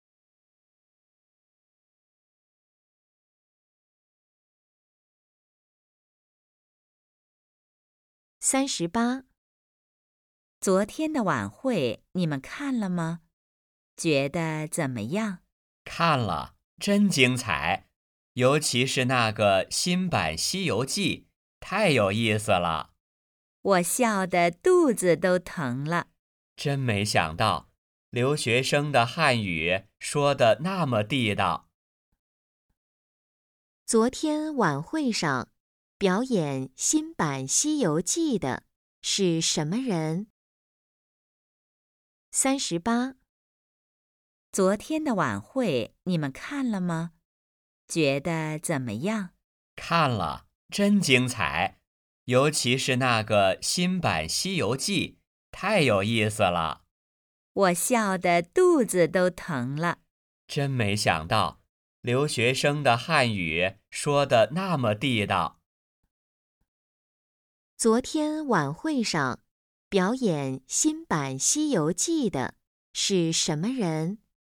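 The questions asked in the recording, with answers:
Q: 昨天晚会上表演新版《西游记》的是什么人?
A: 留学生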